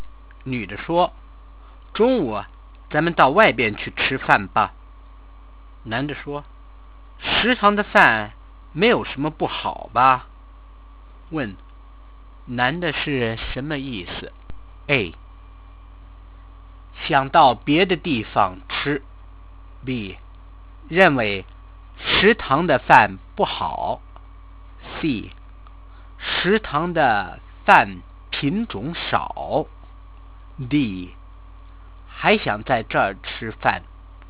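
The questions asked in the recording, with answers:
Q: 男的是什么意思?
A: D: 还想在这儿吃饭。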